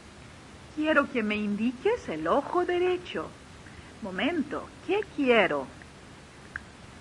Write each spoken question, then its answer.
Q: Momento, ¿qué quiero?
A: Usted quiere que yo le indique el ojo derecho.